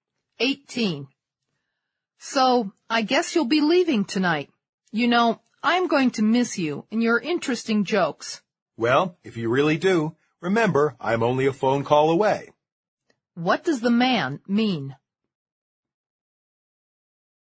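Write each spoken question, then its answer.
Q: What does the man mean?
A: The woman can call him any time if she misses him.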